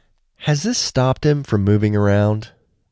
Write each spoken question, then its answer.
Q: Has this stopped him from moving around?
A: No, this hasn't stopped him from moving around.